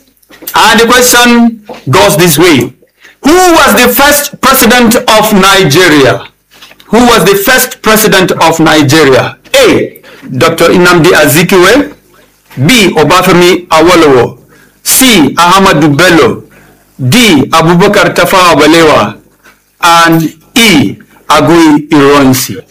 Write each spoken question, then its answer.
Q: Who was the first president of Nigeria?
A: It's A, Dr. Nnamdi Azikiwe.